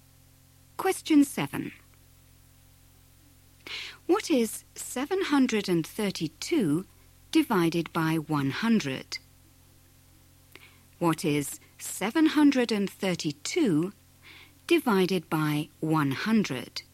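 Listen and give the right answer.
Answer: 7.32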